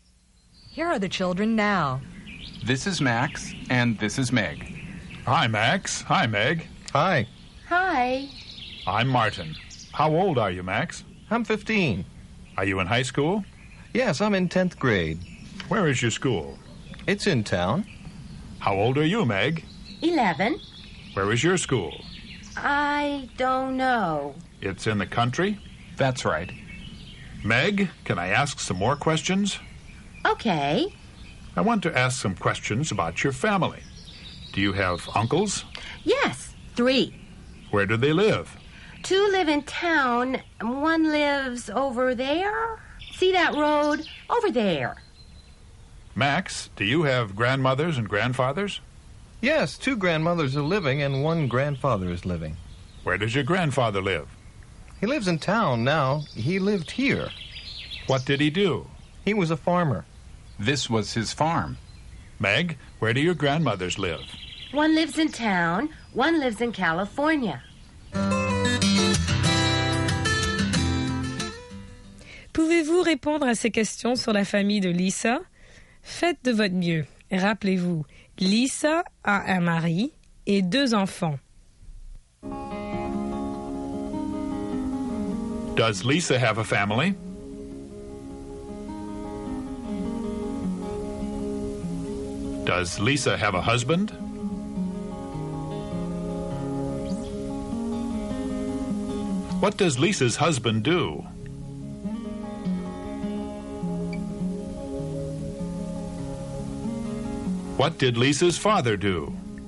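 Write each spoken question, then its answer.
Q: Does Lisa have a family?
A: Yes, she does.

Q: Does Lisa have a husband?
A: Yes, she does.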